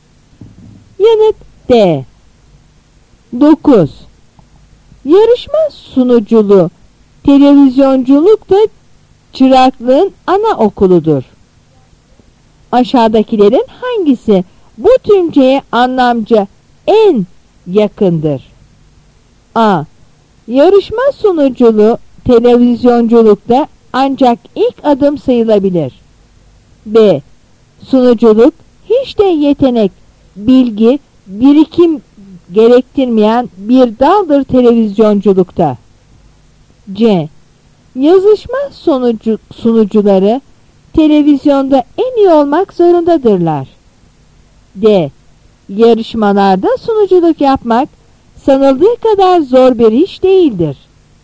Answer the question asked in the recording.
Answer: Yanıt A.